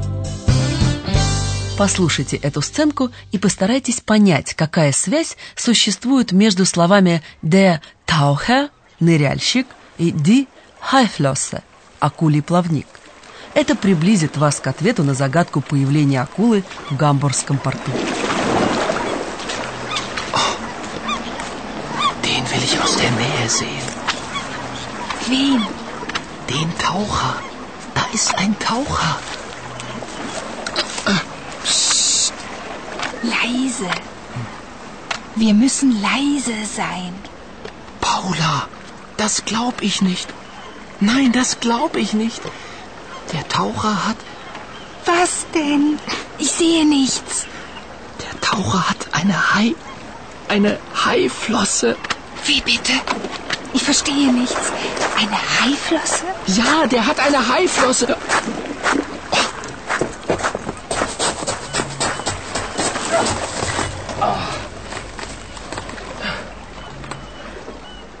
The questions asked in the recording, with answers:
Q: постарайтесь понять, какая связь существует между словами «der Taucher» – «ныряльщик» и «die Haiflosse» – «акулий плавник».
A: У ныряльщика акулий плавник.